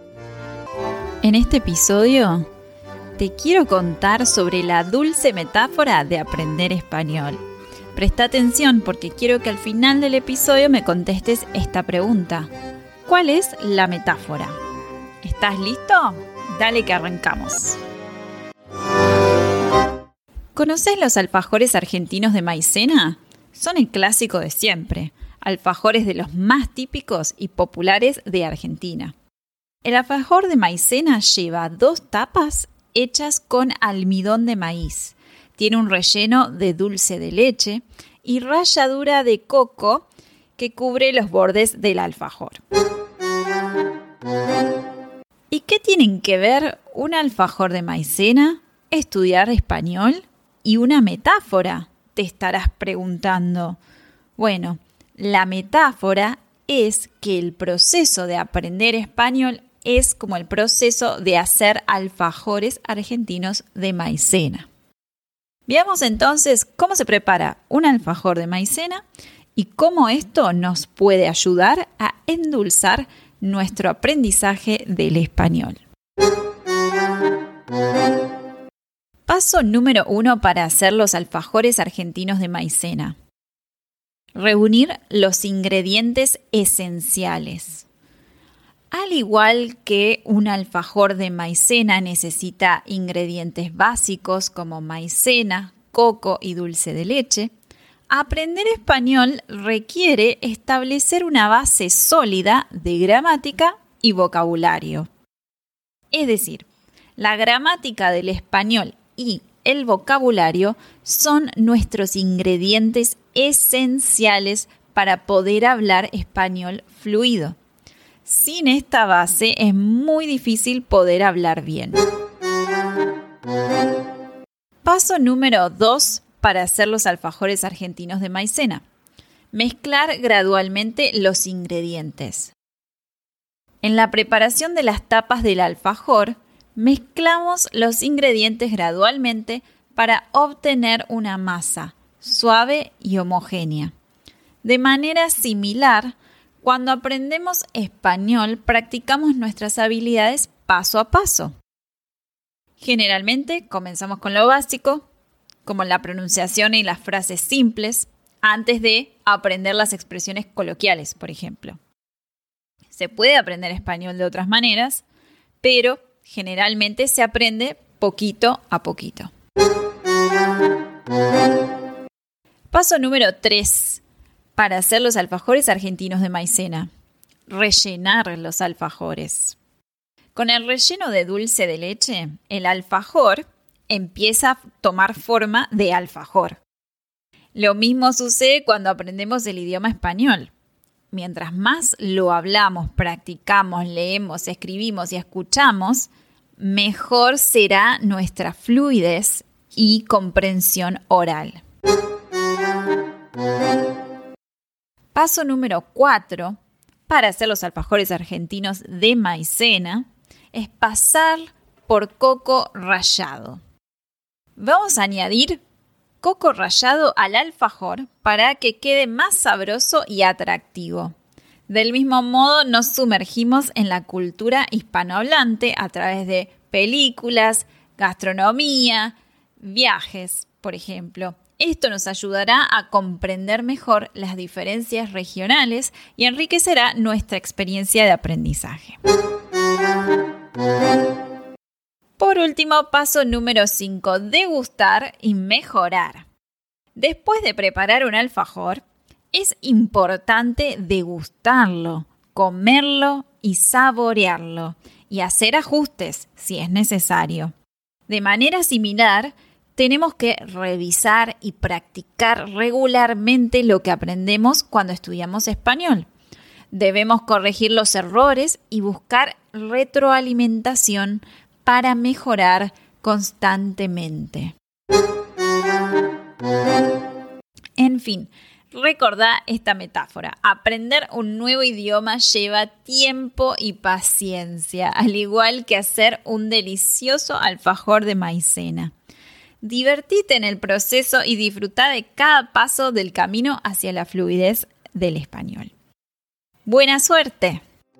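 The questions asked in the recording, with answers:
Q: ¿Cuál es la metáfora?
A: Aprender español es como hacer alfajores argentinos de maicena.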